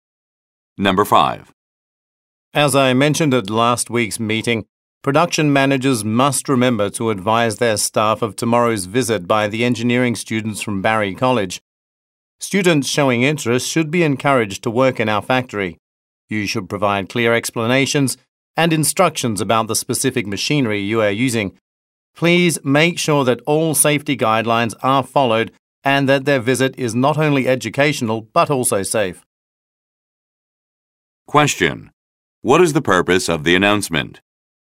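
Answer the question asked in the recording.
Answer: To remind production managers to prepare their staff for tomorrow's visit by engineering students from Barry College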